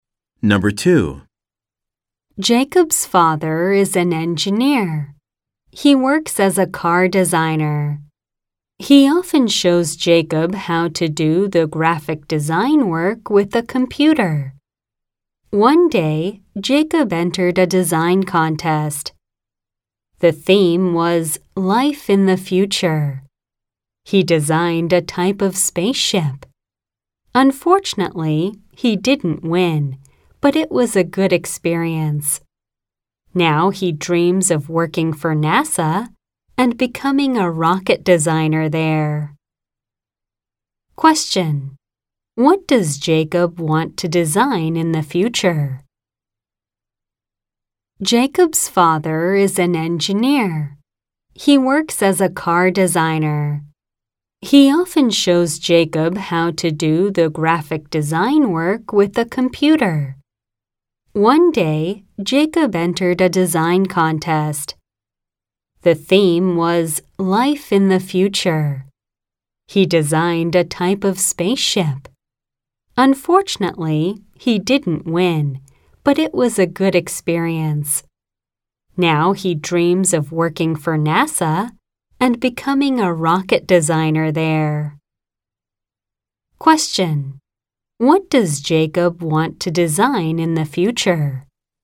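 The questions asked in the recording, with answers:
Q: What does Jacob want to design in the future?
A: Rockets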